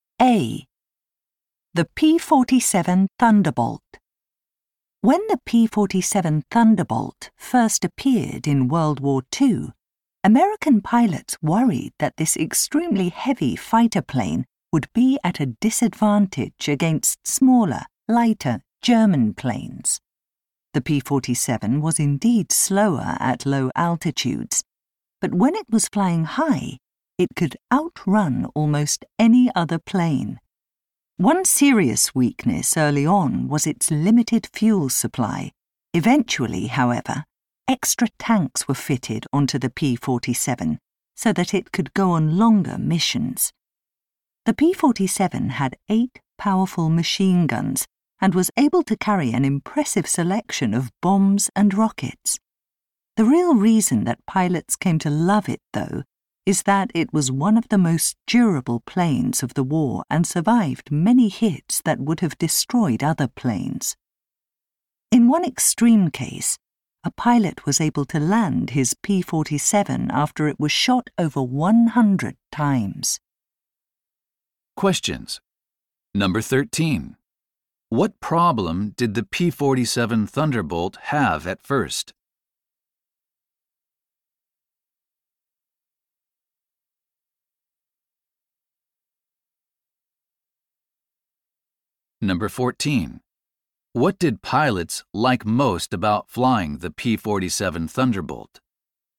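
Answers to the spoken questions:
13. Its fuel supply was limited.
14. It was very durable and could survive many hits.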